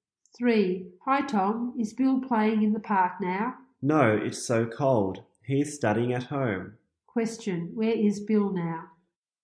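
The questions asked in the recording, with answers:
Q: Question, where is Bill now?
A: At home.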